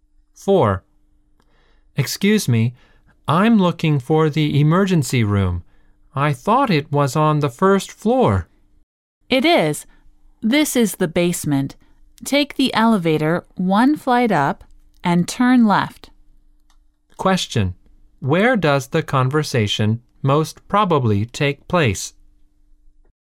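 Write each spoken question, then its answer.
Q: Where does the conversation most probably take place?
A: In a hospital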